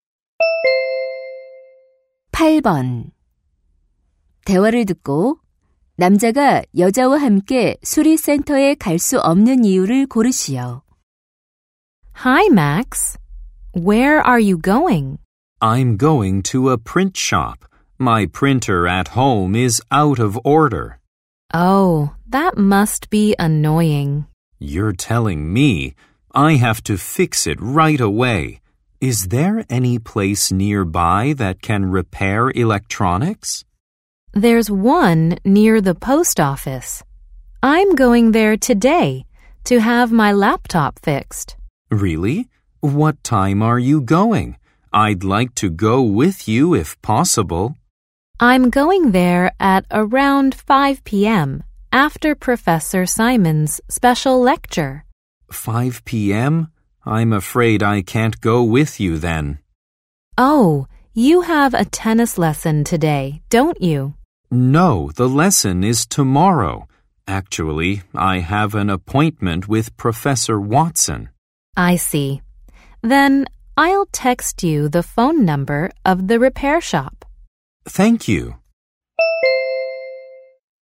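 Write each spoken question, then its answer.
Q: 대화를 듣고 남자가 여자와 함께 수리센터에 갈 수 없는 이유를 고르시오.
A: Watson 교수와 약속이 있어서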